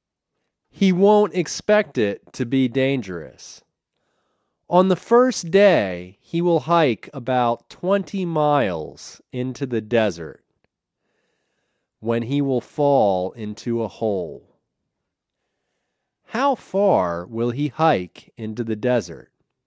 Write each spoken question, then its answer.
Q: How far will he hike into the desert?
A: He will hike 20 miles into the desert.